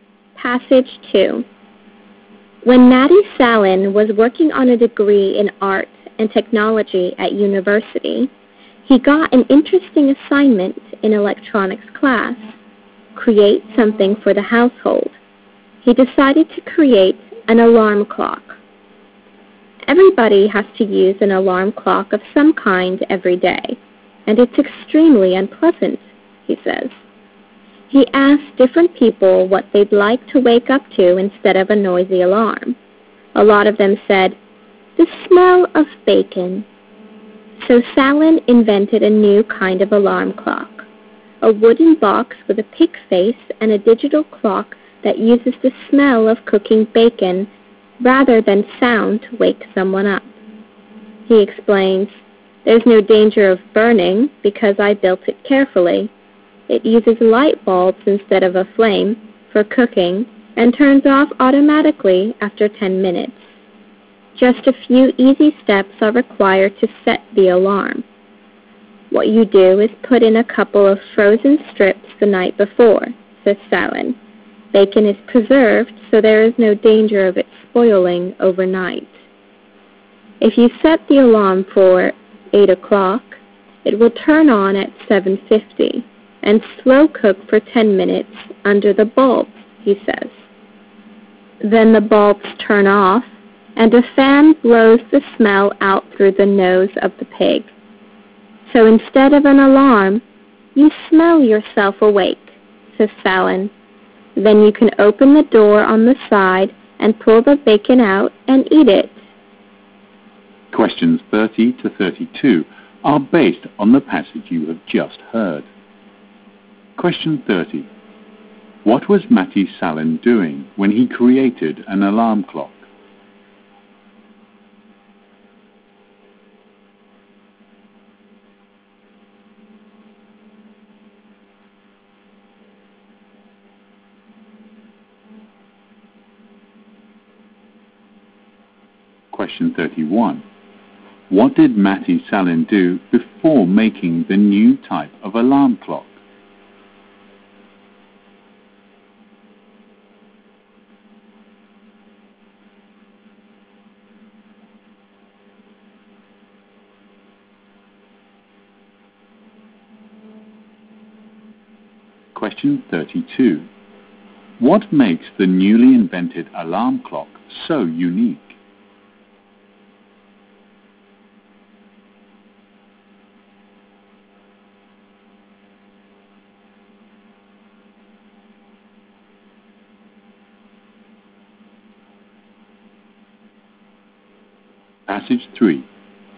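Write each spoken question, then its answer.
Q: What was Matty Salin doing when he created an alarm clock?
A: Working on a university degree in art and technology (an electronics class assignment).

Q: What did Matty Salin do before making the new type of alarm clock?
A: He asked people what they would like to wake up to.

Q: What makes the newly invented alarm clock so unique?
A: It wakes people with the smell of cooking bacon instead of a sound.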